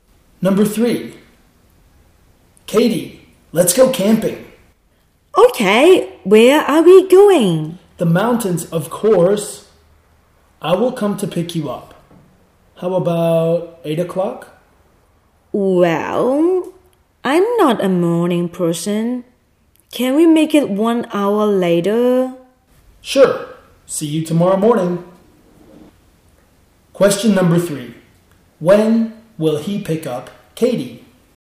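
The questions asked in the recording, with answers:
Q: Question number 3. When will he pick up Katie?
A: At 9 o'clock tomorrow morning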